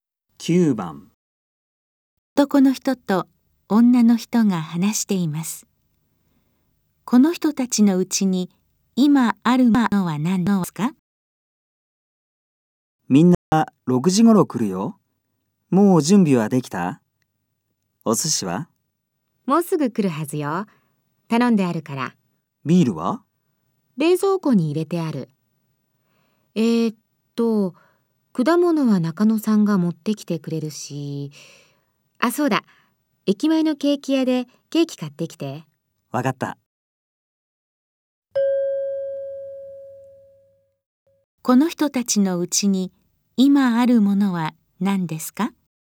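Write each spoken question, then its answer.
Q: この人たちのうちに今あるものは何ですか?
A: ビール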